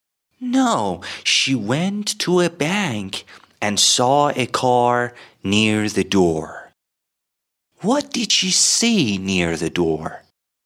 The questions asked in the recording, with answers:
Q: What did she see near the door?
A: She saw a car. She saw a car near the door.